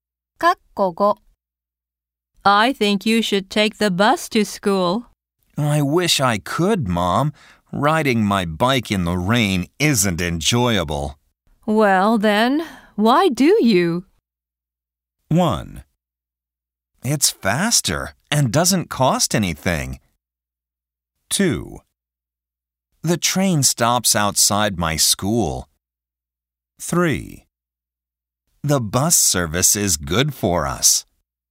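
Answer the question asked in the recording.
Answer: 1: It's faster and doesn't cost anything.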